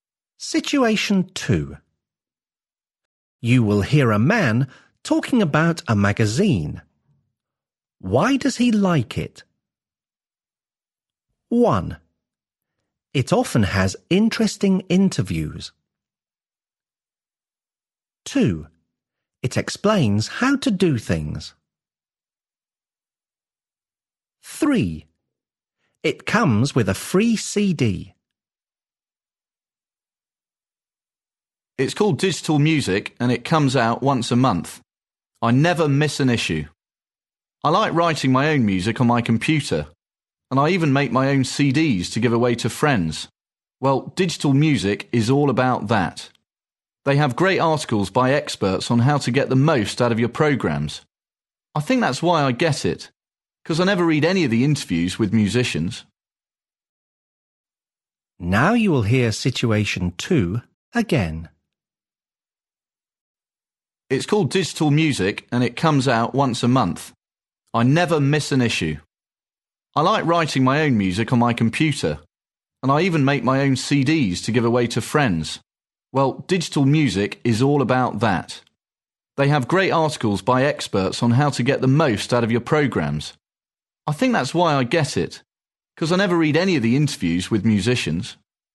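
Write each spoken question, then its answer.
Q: Why does he like it?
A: 2: It explains how to do things.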